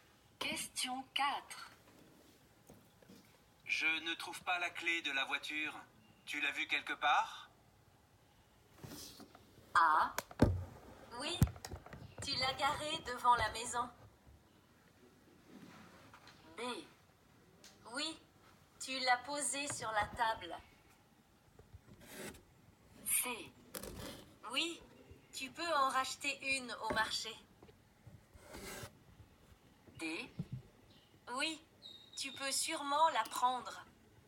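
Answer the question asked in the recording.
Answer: B: Oui. Tu l'as posée sur la table.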